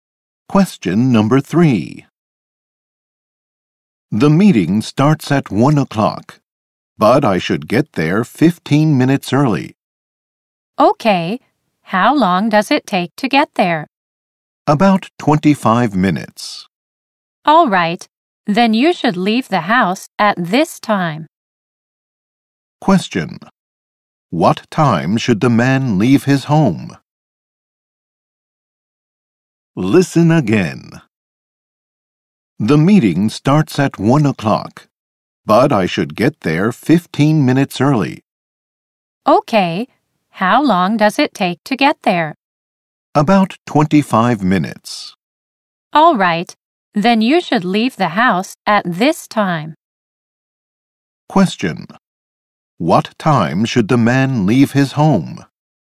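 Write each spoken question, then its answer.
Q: What time should the man leave his home?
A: 12:20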